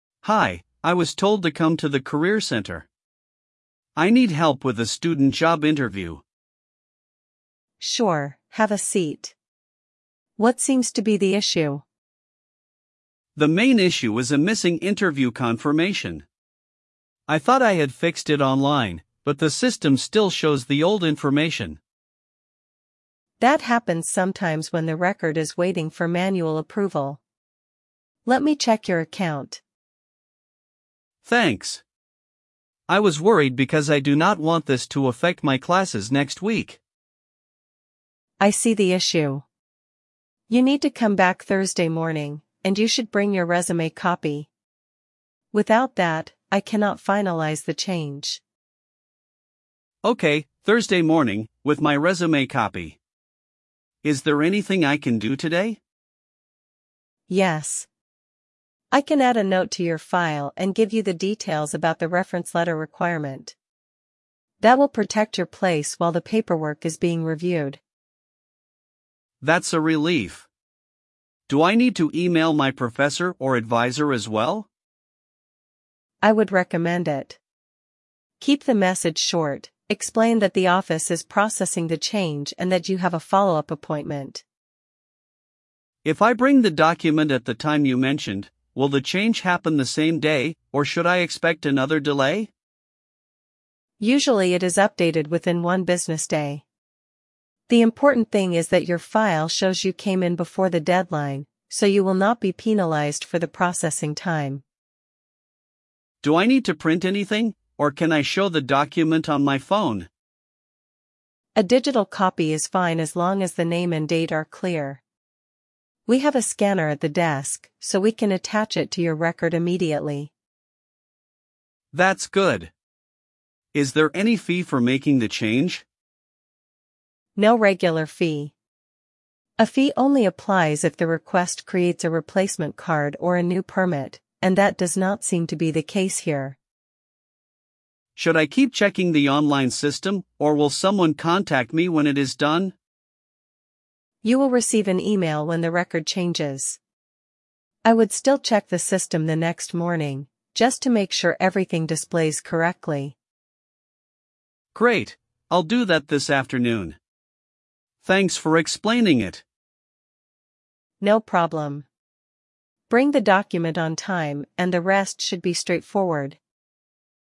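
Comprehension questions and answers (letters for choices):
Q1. Why does the student visit the office?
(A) To get help with a student job interview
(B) To pay a parking fine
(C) To borrow a textbook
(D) To attend a lecture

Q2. What is the main issue?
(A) A missing interview confirmation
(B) A lost phone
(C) A cancelled concert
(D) A broken printer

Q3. Why has the online change not gone through?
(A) It needs manual approval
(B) The student missed the deadline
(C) The professor rejected it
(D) The office is closed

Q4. When should the student come back?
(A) Tomorrow morning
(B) Thursday morning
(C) Next month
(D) After graduation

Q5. What should the student bring?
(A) Resume copy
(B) A library book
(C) A bus ticket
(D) A lab coat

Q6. What will the staff do today?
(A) Add a note and explain the reference letter requirement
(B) Cancel the student's account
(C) Call the student's parents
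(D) Move the exam date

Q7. What does the staff recommend emailing?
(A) A short explanation to the professor or advisor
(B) A complaint to the dean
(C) A refund request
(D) A job application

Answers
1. A
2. A
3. A
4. B
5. A
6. A
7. A

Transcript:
Student: Hi, I was told to come to the career centre. I need help with a student job interview.
Staff: Sure, have a seat. What seems to be the issue?
Student: The main issue is a missing interview confirmation. I thought I had fixed it online, but the system still shows the old information.
Staff: That happens sometimes when the record is waiting for manual approval. Let me check your account.
Student: Thanks. I was worried because I do not want this to affect my classes next week.
Staff: I see the issue. You need to come back Thursday morning, and you should bring your resume copy. Without that, I cannot finalise the change.
Student: Okay, Thursday morning, with my resume copy. 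Is there anything I can do today?
Staff: Yes. I can add a note to your file and give you the details about the reference letter requirement. That will protect your place while the paperwork is being reviewed.
Student: That's a relief. Do I need to email my professor or advisor as well?
Staff: I would recommend it. Keep the message short: explain that the office is processing the change and that you have a follow-up appointment.
Student: If I bring the document at the time you mentioned, will the change happen the same day, or should I expect another delay?
Staff: Usually it is updated within one business day. The important thing is that your file shows you came in before the deadline, so you will not be penalised for the processing time.
Student: Do I need to print anything, or can I show the document on my phone?
Staff: A digital copy is fine as long as the name and date are clear. We have a scanner at the desk, so we can attach it to your record immediately.
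Student: That's good. Is there any fee for making the change?
Staff: No regular fee. A fee only applies if the request creates a replacement card or a new permit, and that does not seem to be the case here.
Student: Should I keep checking the online system, or will someone contact me when it is done?
Staff: You will receive an email when the record changes. I would still check the system the next morning, just to make sure everything displays correctly.
Student: Great, I'll do that this afternoon. Thanks for explaining it.
Staff: No problem. Bring the document on time, and the rest should be straightforward.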